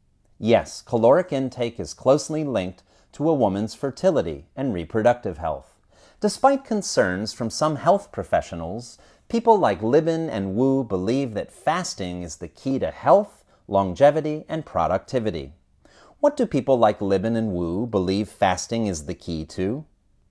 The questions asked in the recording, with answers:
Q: What do people like Libin and Wu believe fasting is the key to?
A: People like Libin and Wu believe that fasting is the key to health, longevity, and productivity.